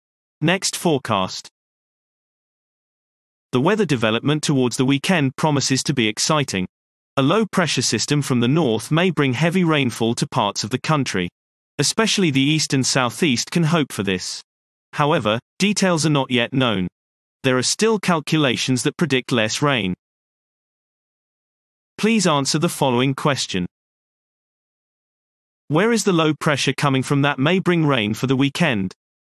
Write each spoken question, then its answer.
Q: Where is the low pressure coming from that may bring rain for the weekend?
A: The low is coming from the north.